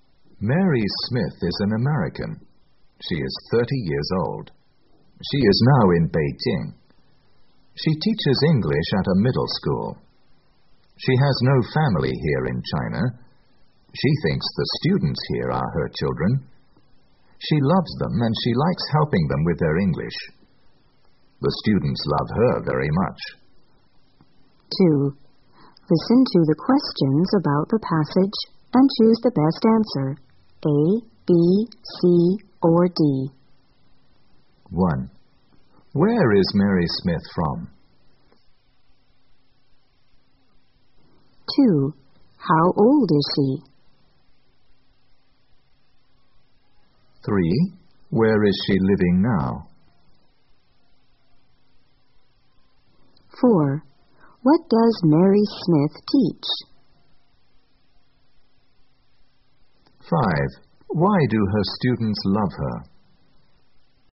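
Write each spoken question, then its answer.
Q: Where is Mary Smith from?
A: America

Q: How old is she?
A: 30 years old

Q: Where is she living now?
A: In Beijing

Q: What does Mary Smith teach?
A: English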